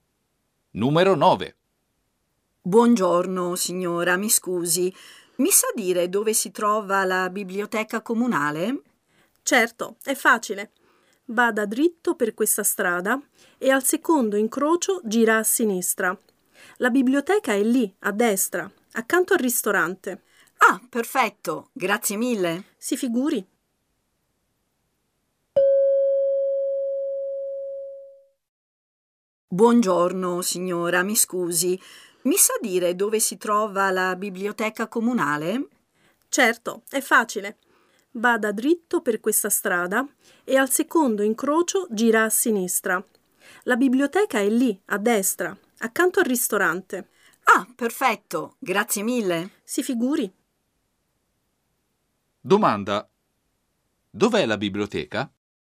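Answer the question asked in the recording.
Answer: Al secondo incrocio a sinistra, a destra, accanto al ristorante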